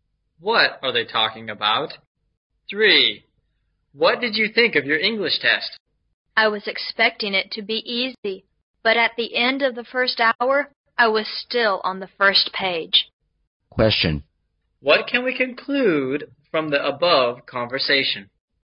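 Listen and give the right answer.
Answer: The test was harder than expected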